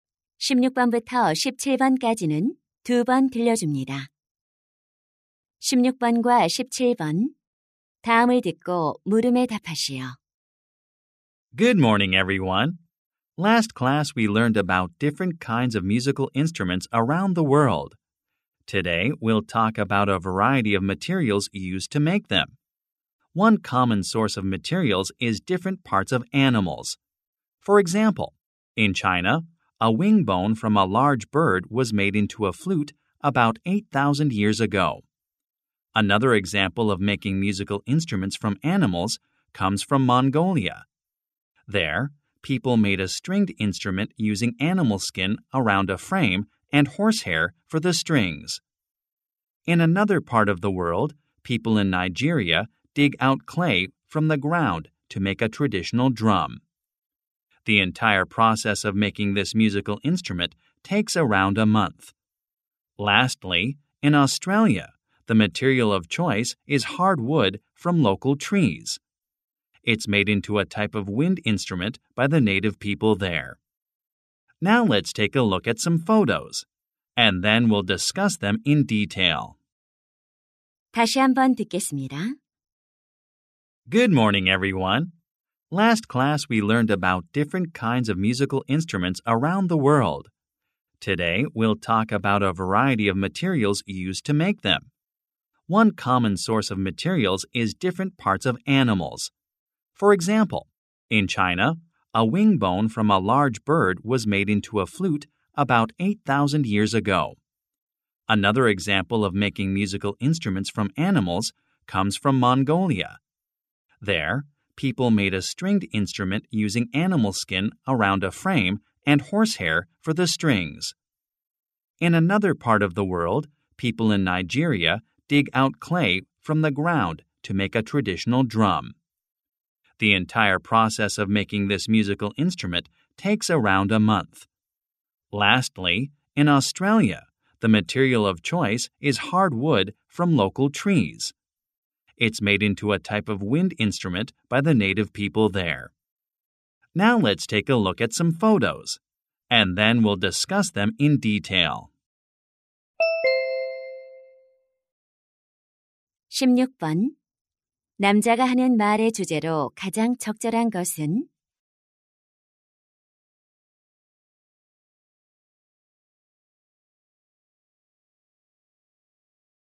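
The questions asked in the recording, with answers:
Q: 남자가 하는 말의 주제로 가장 적절한 것은?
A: 세계 각지의 악기를 만드는 데 사용된 다양한 재료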